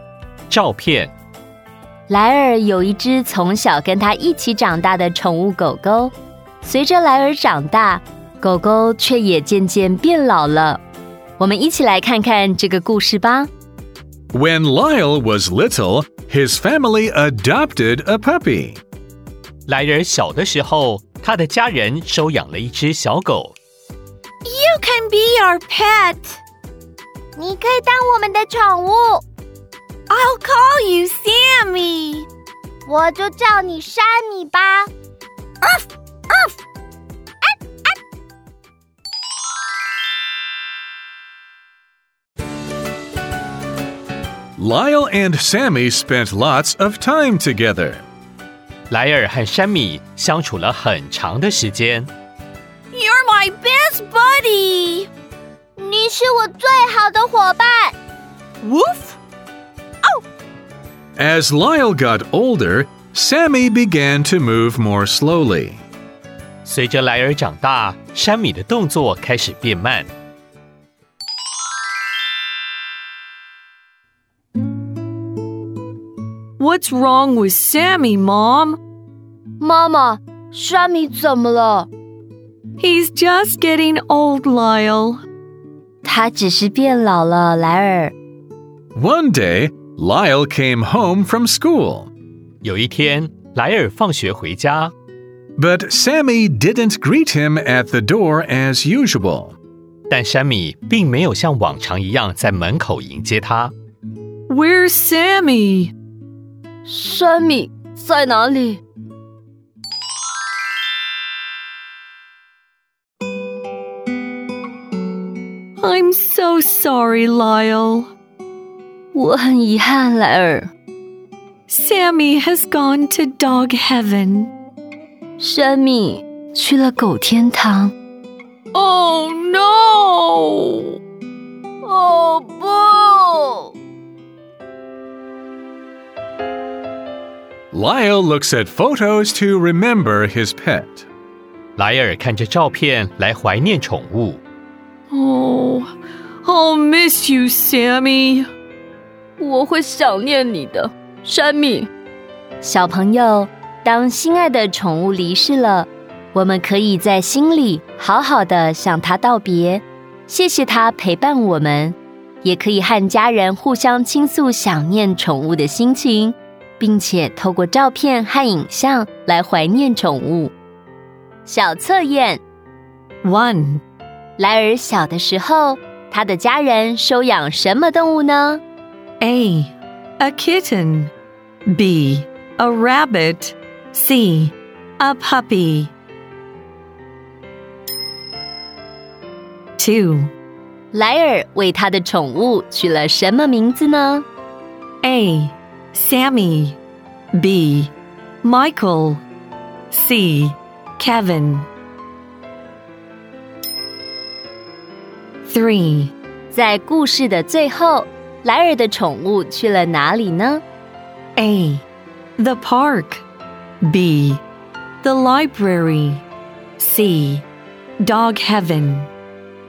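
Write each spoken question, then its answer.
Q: 莱尔小的时候,他的家人收养什么动物呢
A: C: A puppy

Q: 莱尔为他的宠物取了什么名字呢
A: A: Sammy

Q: 在故事的最后,莱尔的宠物去了哪里呢?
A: C: Dog heaven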